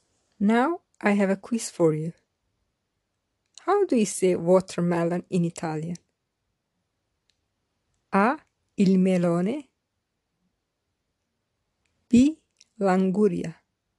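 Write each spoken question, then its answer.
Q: How do you say watermelon in Italian?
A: B: L'anguria.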